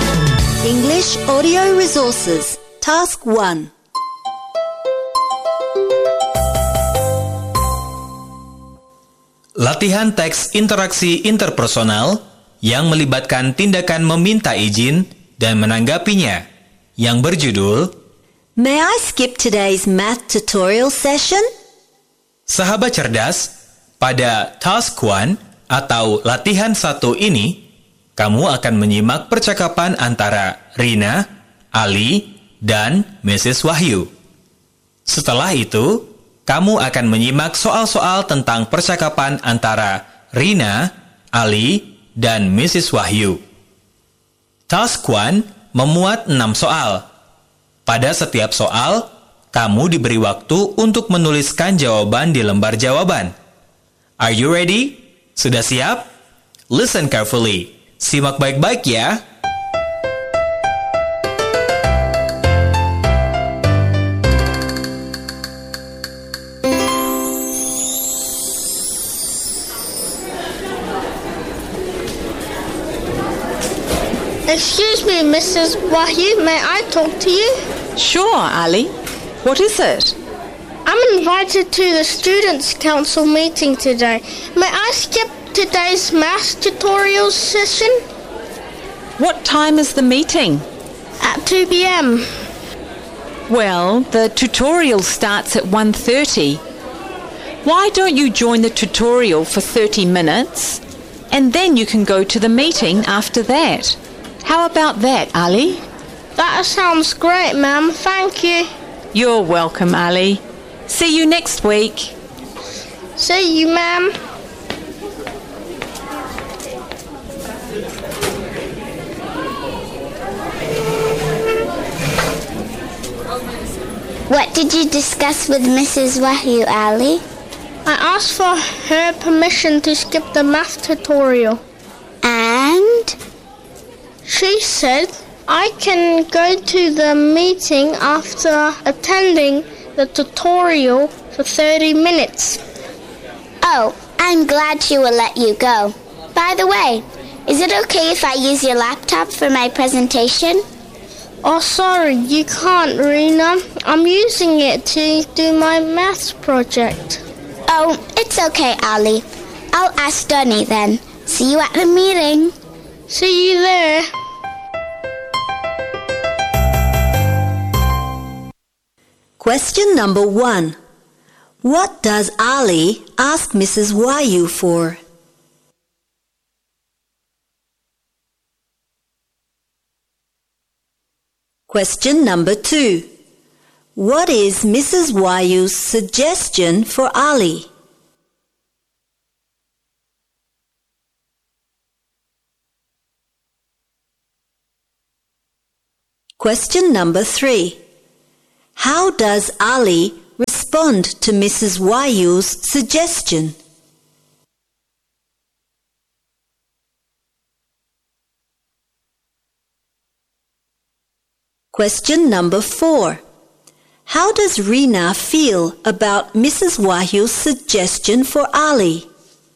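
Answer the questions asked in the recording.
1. Permission to skip today's math tutorial session
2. Join the tutorial for 30 minutes, then go to the meeting
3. He agrees; he says it sounds great and thanks her
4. She is glad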